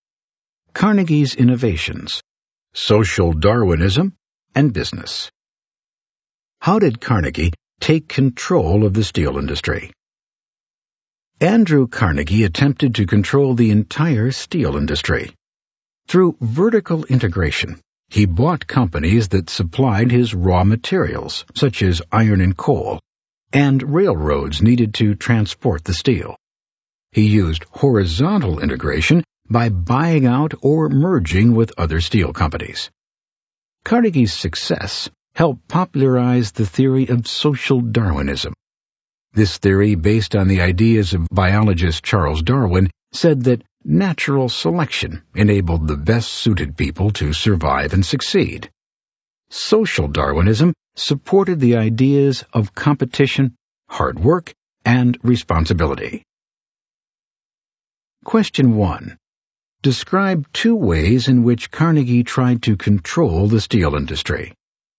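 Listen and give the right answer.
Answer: Vertical integration (buying suppliers of raw materials and railroads) and horizontal integration (buying out or merging with other steel companies)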